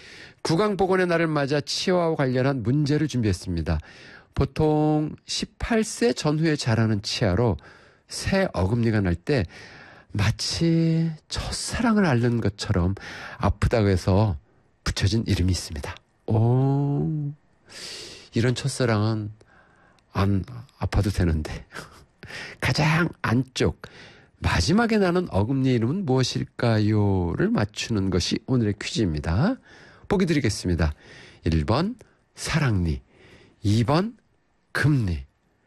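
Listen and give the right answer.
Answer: 1번: 사랑니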